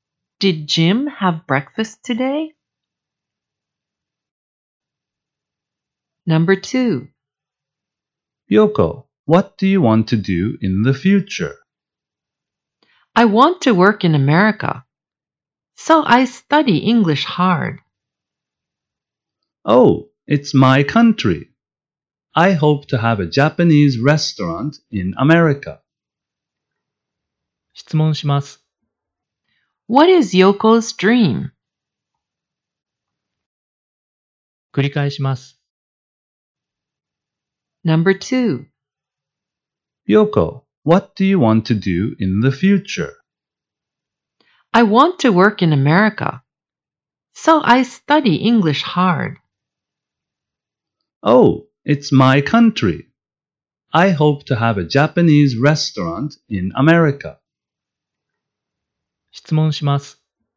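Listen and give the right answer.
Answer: To work in America.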